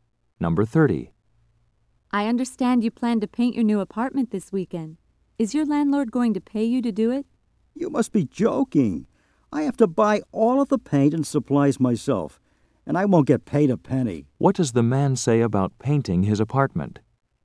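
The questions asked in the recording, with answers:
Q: What does the man say about painting his apartment?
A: He must pay for everything and won't be paid.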